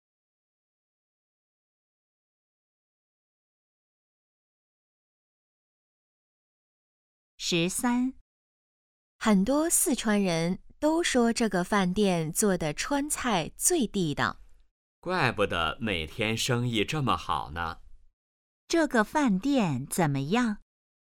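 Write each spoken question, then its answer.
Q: 这个饭店怎么样?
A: 川菜很地道,生意很好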